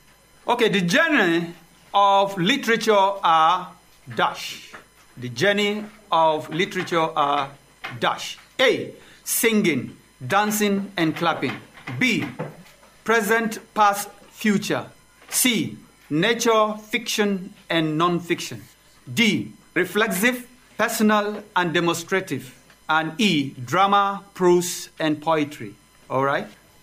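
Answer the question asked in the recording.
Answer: E: drama, prose, and poetry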